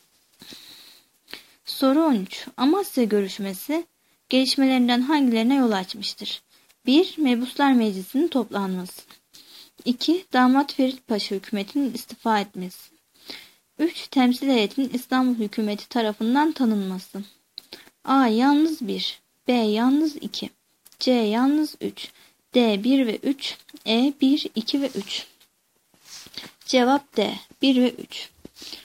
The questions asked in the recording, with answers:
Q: Amasya görüşmesi gelişmelerinden hangilerine yol açmıştır?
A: Cevap D. 1 ve 3.